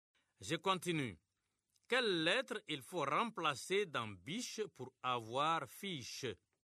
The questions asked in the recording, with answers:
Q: Quelle lettre il faut remplacer dans biche pour avoir fiche?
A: Monsieur, c'est la lettre B.